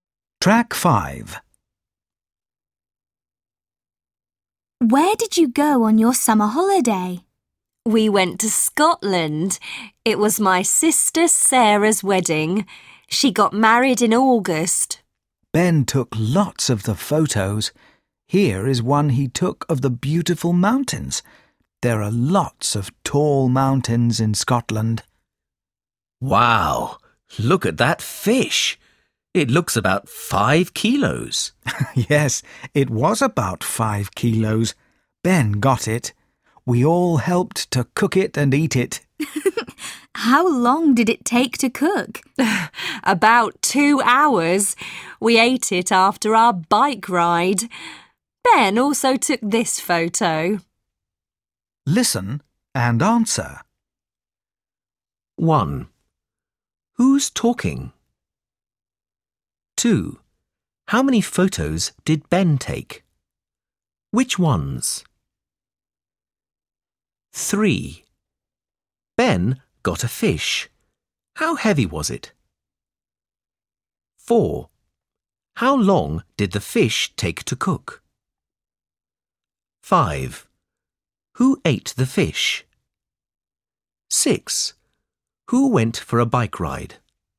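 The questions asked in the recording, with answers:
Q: Ben got a fish. How heavy was it?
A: About 5 kilos

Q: How long did the fish take to cook?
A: About 2 hours

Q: Who ate the fish?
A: They all did (the family)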